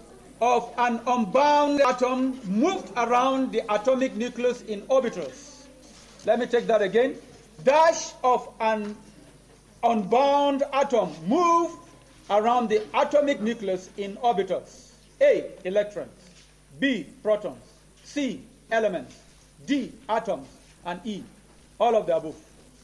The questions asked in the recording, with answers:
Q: Dash of an unbound atom move around the atomic nucleus in orbitals.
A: Electrons, yes.